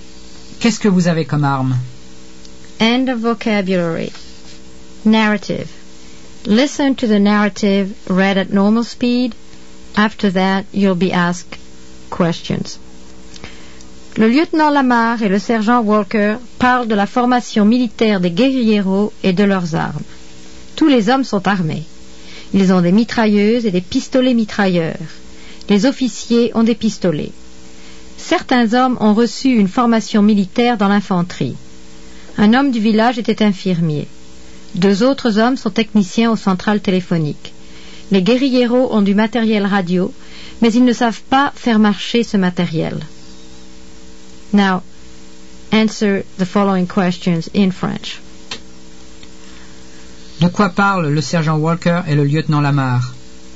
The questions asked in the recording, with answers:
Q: De quoi parlent le sergent Walker et le lieutenant Lamar?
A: Ils parlent de la formation militaire des guérilleros et de leurs armes.